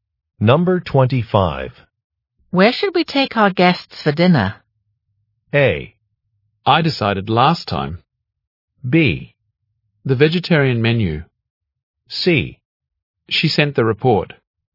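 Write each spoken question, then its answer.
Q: Where should we take our guests for dinner?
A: A: I decided last time.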